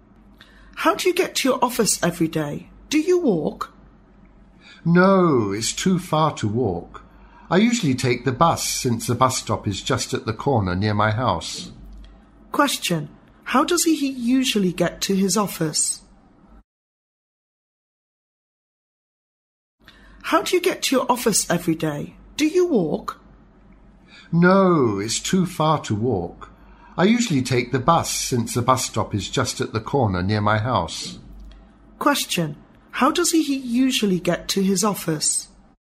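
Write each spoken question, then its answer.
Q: How does he usually get to his office?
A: By bus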